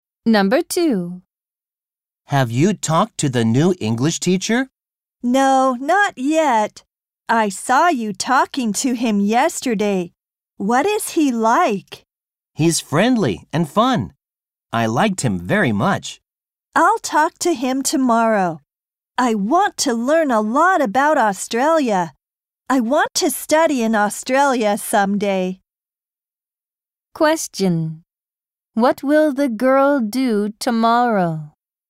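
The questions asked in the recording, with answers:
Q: What will the girl do tomorrow?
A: Talk to the new English teacher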